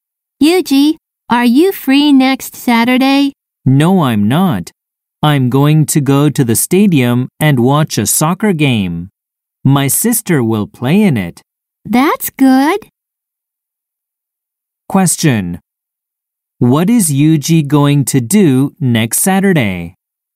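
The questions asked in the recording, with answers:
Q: What is Yuji going to do next Saturday?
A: Go to the stadium and watch a soccer game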